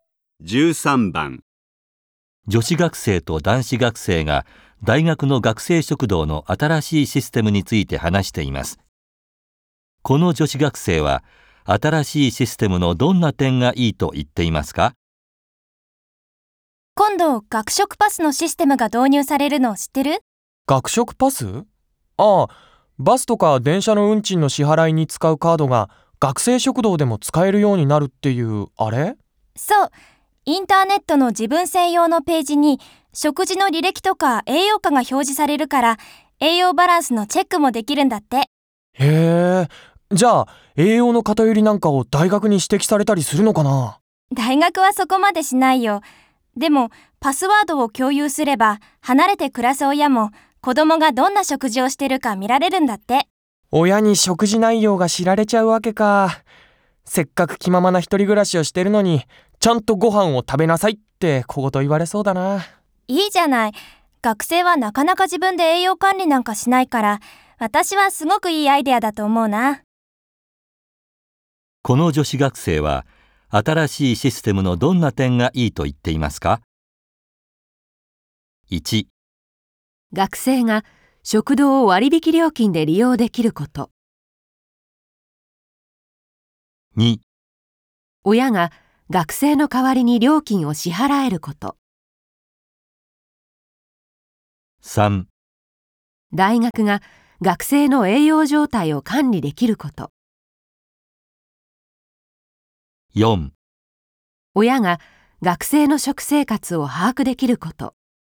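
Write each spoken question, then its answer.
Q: この女子学生は新しいシステムのどんな点がいいと言っていますか?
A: 4: 親が学生の食生活を把握できること。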